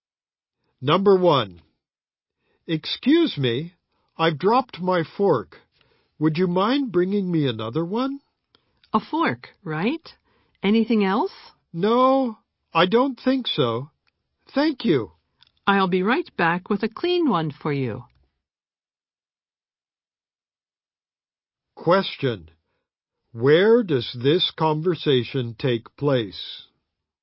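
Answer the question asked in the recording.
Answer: At a restaurant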